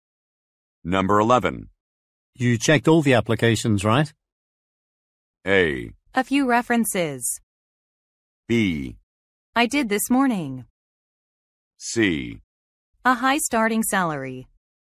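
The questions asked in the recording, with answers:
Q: You checked all the applications, right?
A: B: I did this morning.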